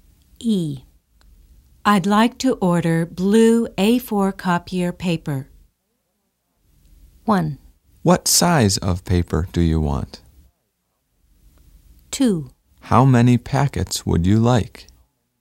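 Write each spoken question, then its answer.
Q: I'd like to order blue A4 copier paper.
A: 2: How many packets would you like?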